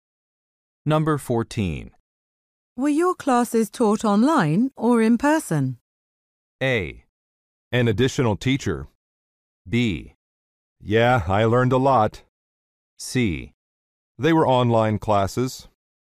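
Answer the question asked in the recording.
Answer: C: They were online classes.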